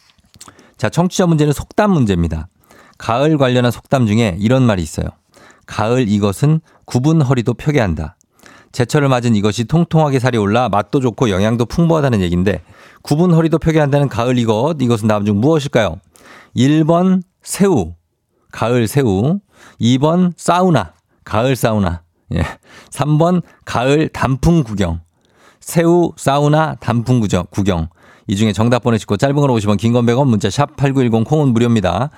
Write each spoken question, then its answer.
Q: 구분 허리도 펴게 한다는 가을 이것 이것은 다음 중 무엇일까요?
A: 정답은 바로 새우입니다.